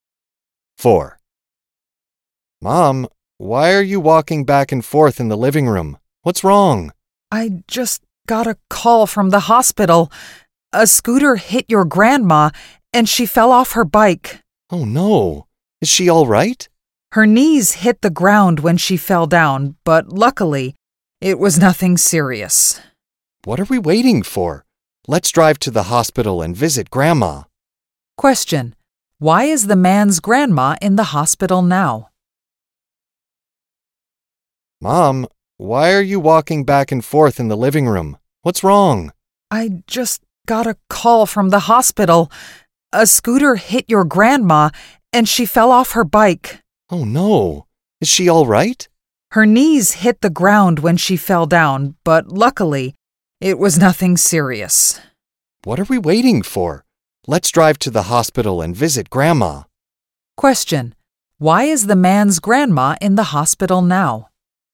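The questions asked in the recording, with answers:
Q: Why is the man's grandma in the hospital now?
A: A scooter hit her, and she fell off her bike.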